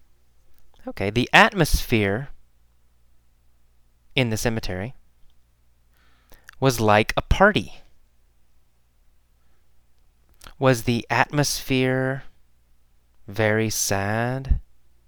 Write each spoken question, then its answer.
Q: Was the atmosphere Very sad?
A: No, no, the atmosphere was not sad.